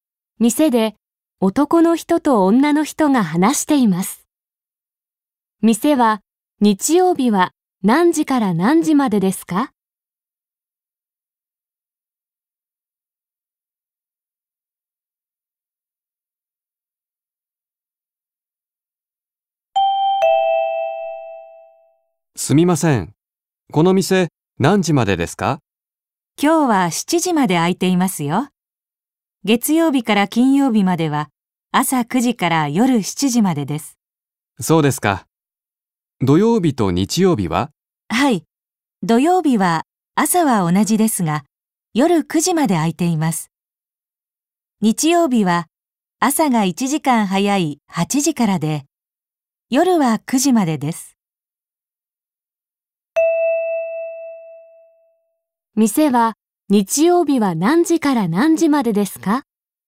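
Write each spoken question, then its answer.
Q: 店は日曜日は何時から何時までですか?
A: 朝8時から夜9時まで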